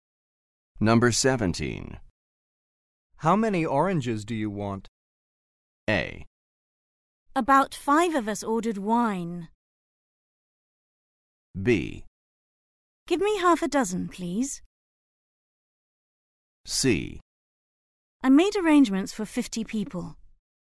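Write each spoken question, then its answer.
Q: How many oranges do you want?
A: B: Give me 6 please.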